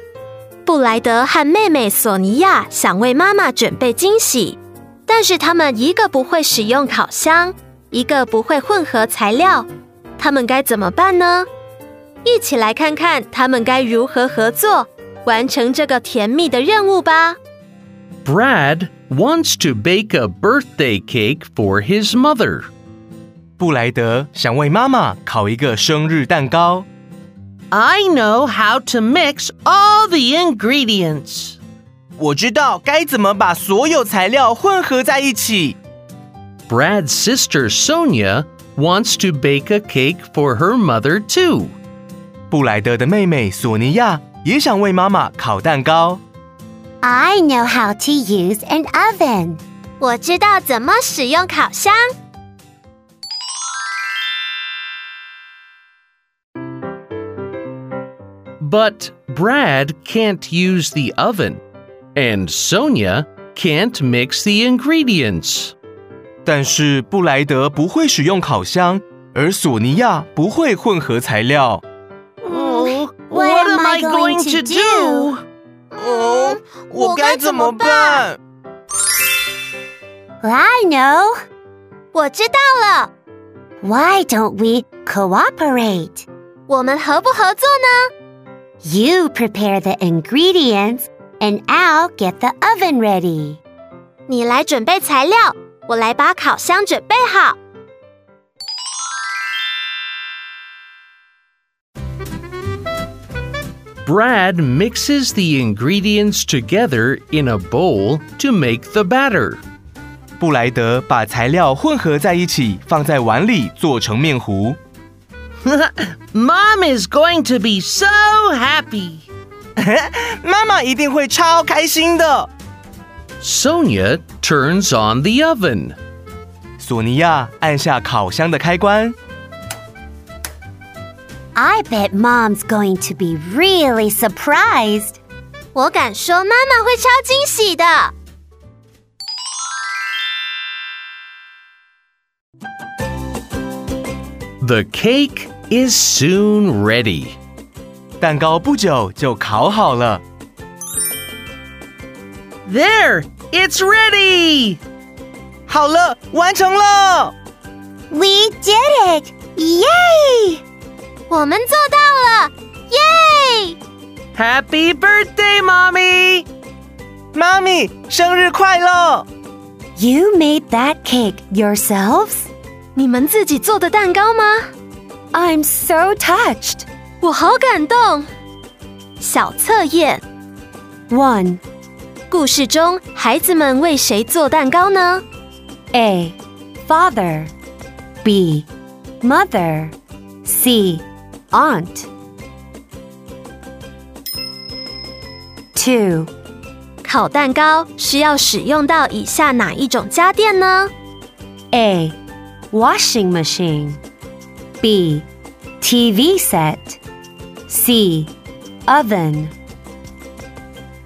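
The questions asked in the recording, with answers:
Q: 故事中,孩子们为谁做蛋糕呢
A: B: Mother.

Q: 烤蛋糕需要使用到以下哪一种家电呢?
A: C: Oven.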